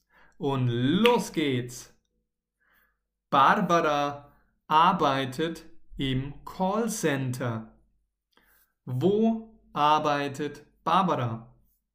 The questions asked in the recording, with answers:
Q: Wo arbeitet Barbara?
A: In einem Callcenter, richtig.